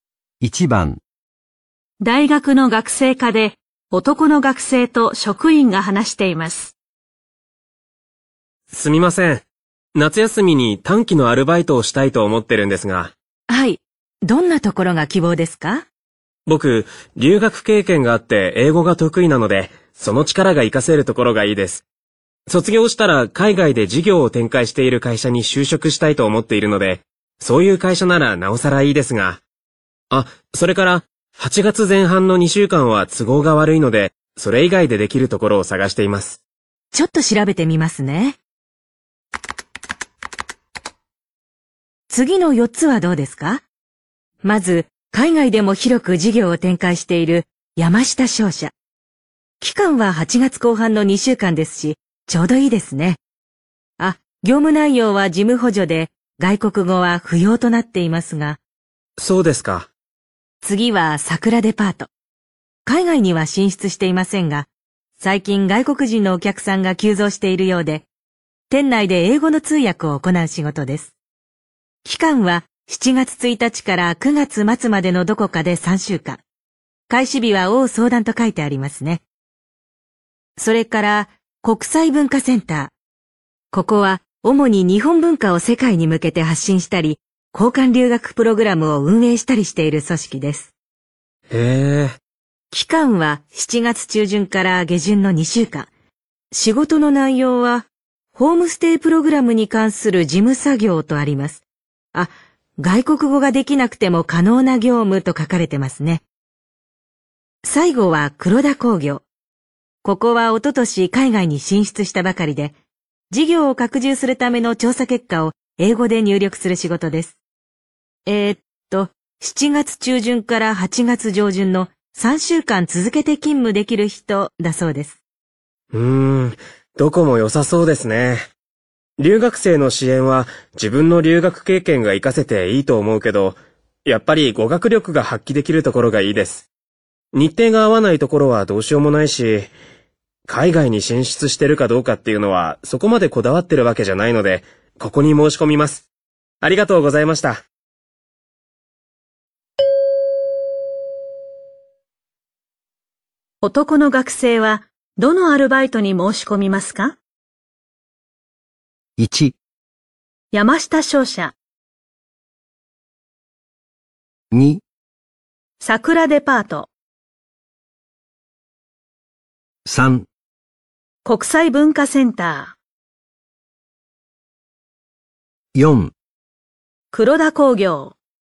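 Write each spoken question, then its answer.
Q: 男の学生はどのアルバイトに申し込みますか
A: 2: 桜デパート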